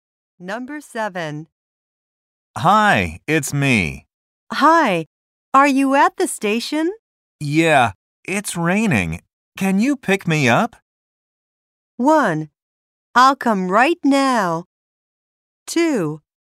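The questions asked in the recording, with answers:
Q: Yeah, it's raining. Can you pick me up?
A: 1: I'll come right now.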